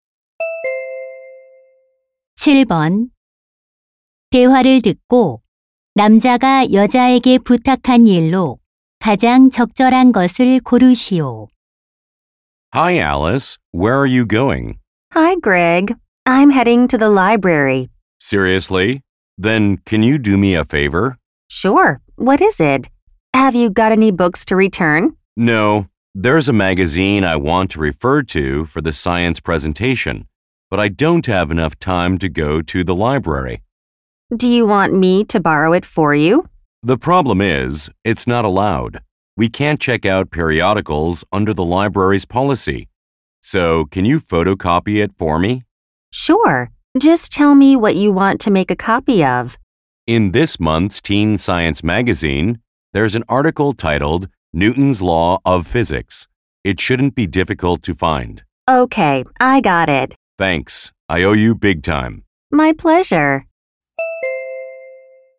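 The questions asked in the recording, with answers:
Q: 7번대화를듣고남자가여자에게부탁한일로가장적절한것을고르시오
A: 잡지 기사 복사하기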